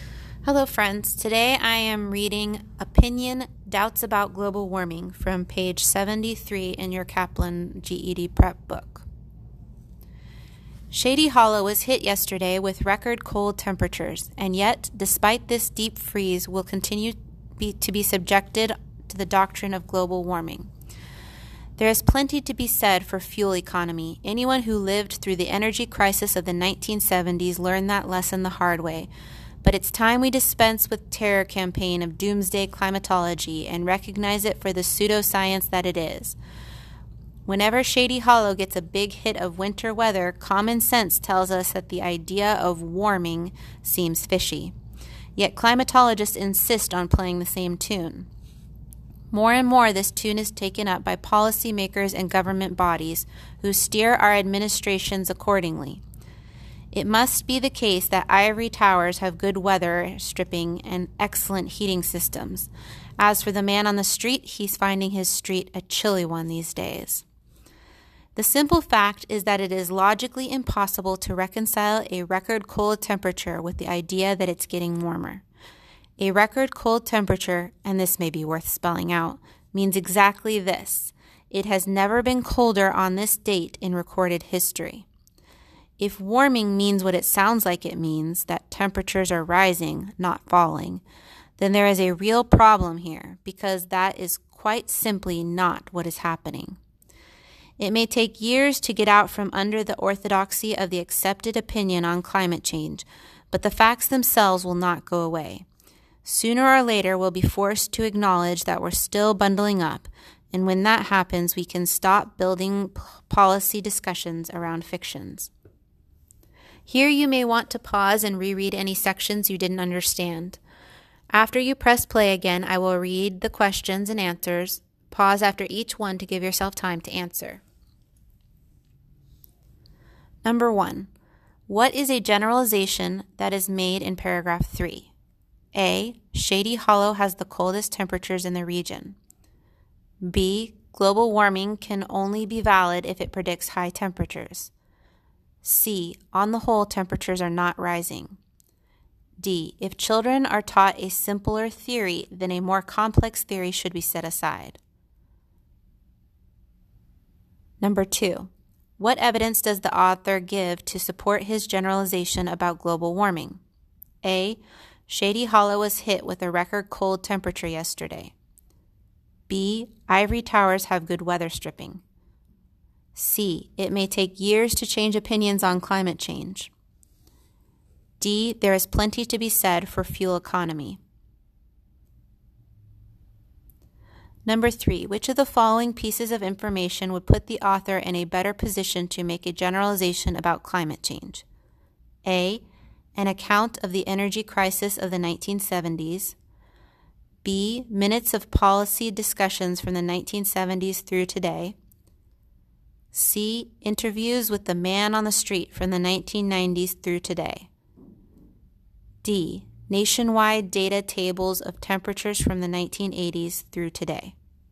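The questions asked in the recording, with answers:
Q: What is a generalization that is made in paragraph 3?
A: C: On the whole, temperatures are not rising.

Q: What evidence does the author give to support his generalization about global warming?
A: A: Shady Hollow was hit with a record cold temperature yesterday.

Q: Which of the following pieces of information would put the author in a better position to make a generalization about climate change?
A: D: Nationwide data tables of temperatures from the 1980s through today.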